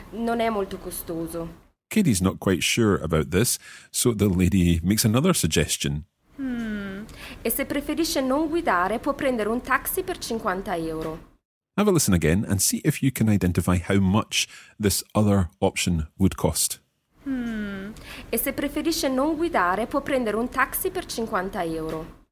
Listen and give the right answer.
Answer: For 50 euros, you can take a taxi for 50 euros.